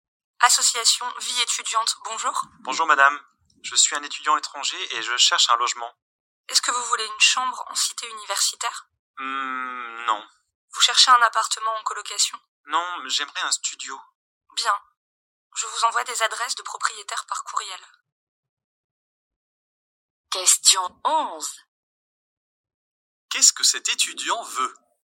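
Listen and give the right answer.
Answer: Un studio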